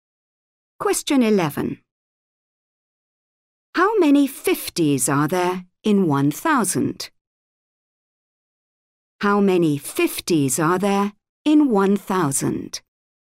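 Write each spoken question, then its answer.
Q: How many 50s are there in 1,000?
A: 20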